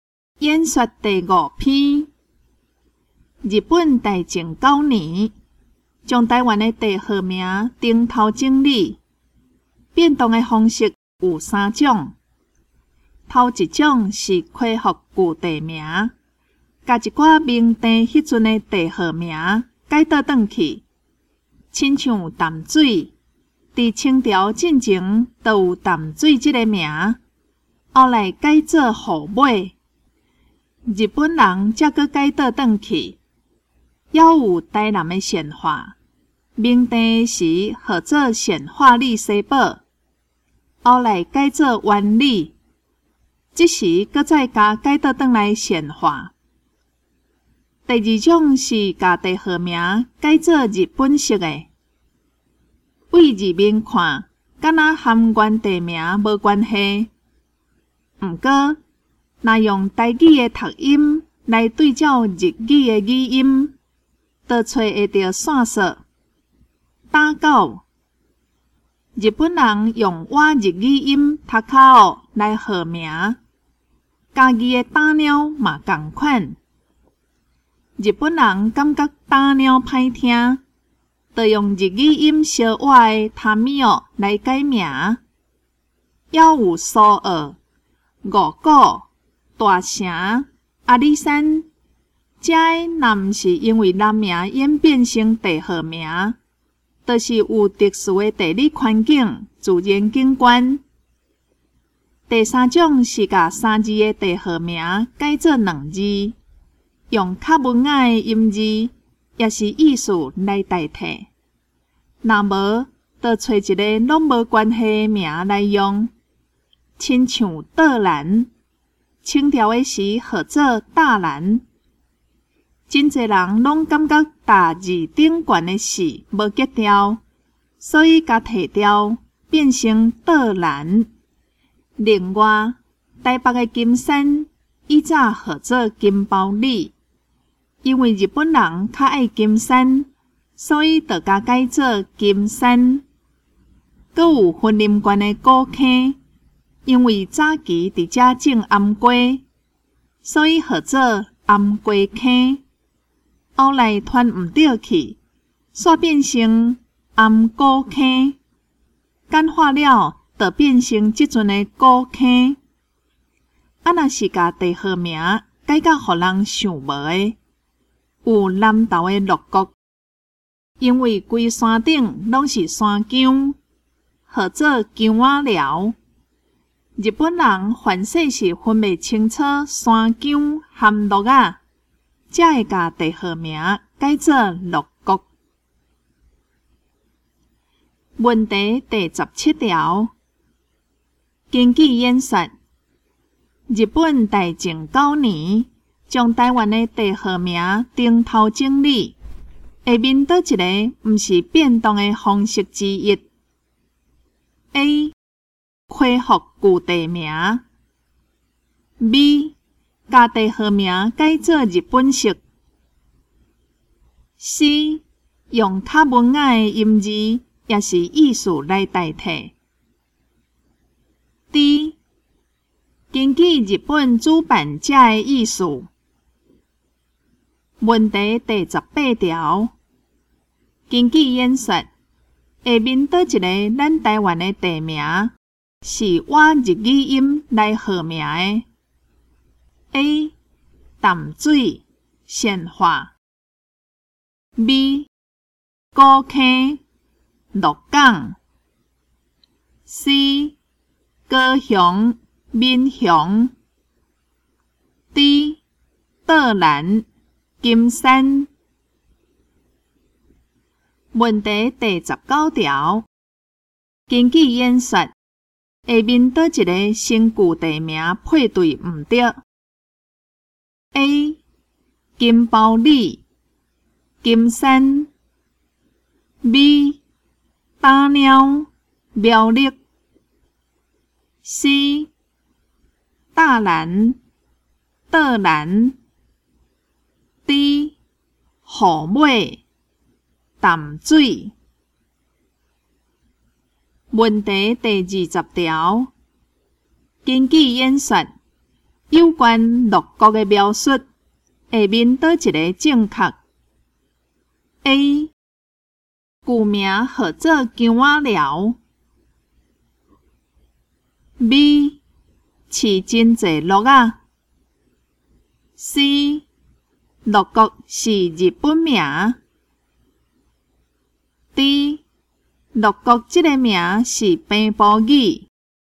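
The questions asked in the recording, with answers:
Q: 根据演说,日本大正九年将台湾的地号名顶头整理,下面倒一个不是变动的方式之一。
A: D: 根据日本主办者的意思

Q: 根据演说,下面倒一个咱台湾的地名。是我日语音来号名的。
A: C: 高雄闽雄

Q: 根据演说, 有关六国的描述,下面倒一个正确。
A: A: 古名号做姜仔寮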